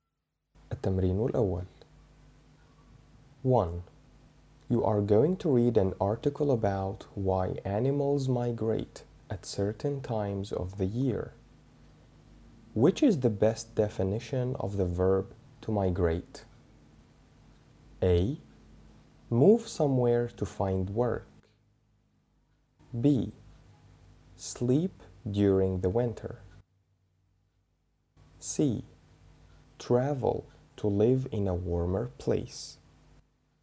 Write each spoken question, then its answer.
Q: Which is the best definition of the verb to migrate?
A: The answer is travel to live in a warmer place.